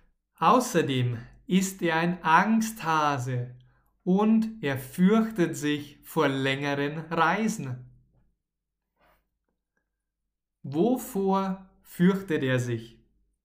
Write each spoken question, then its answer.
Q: Wovor fürchtet er sich.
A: Vor längeren Reisen. Er fürchtet sich vor längeren Reisen.